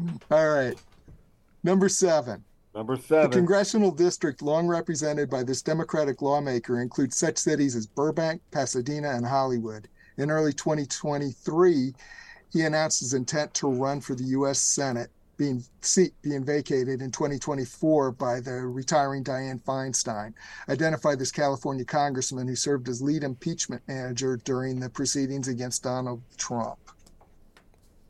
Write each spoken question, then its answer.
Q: Identify this California congressman who served as lead impeachment manager during the proceedings against Donald Trump.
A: Adam Schiff.